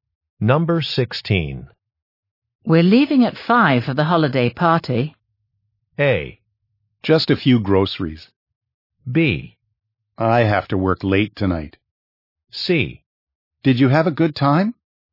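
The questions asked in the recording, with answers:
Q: We're leaving at 5 for the holiday party.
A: B: I have to work late tonight.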